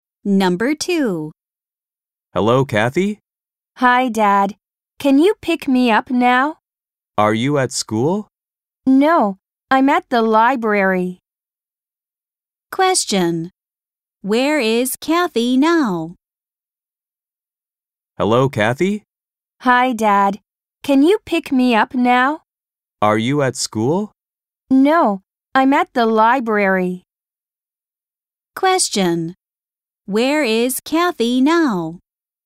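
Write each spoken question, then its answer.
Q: Where is Kathy now?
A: At the library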